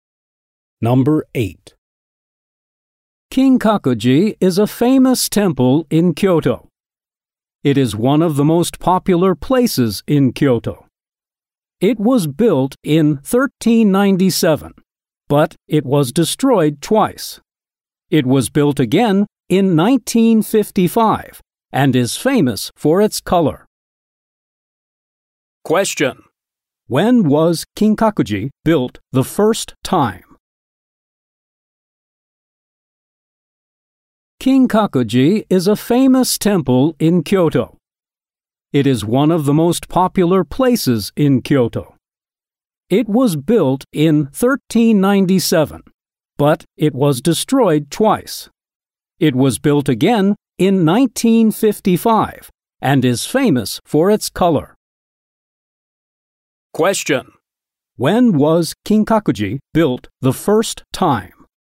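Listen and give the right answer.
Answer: In 1397.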